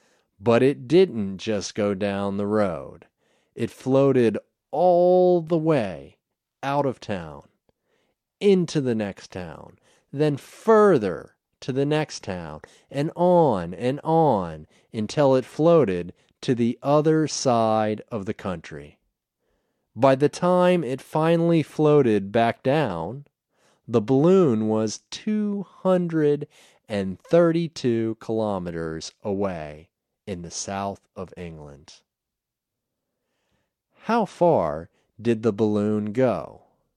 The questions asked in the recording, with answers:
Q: How far did the balloon go?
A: It went 232 kilometers.